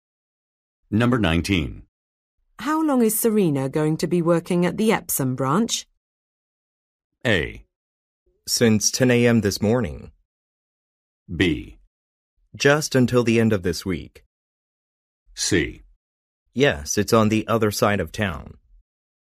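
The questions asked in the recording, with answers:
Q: How long is Serena going to be working at the Epsom branch?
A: B: Just until the end of this week.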